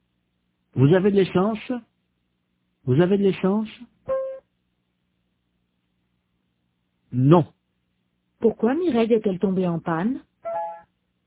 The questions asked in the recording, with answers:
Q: Pourquoi Mireille est-elle tombée en panne ?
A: Parce qu'elle n'avait plus d'essence.